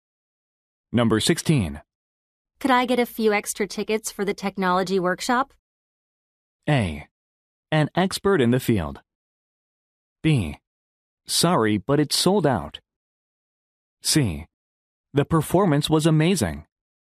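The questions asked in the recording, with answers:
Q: Could I get a few extra tickets for the technology workshop?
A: B: Sorry, but it's sold out.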